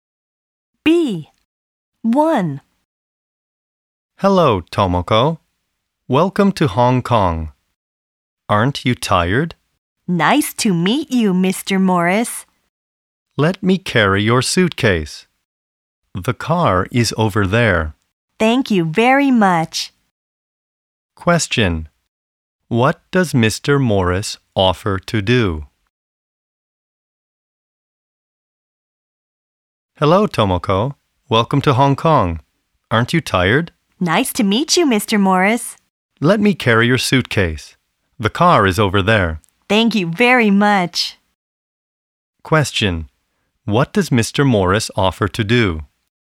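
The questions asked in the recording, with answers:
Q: What does Mr. Morris offer to do?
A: Carry Tomoko's suitcase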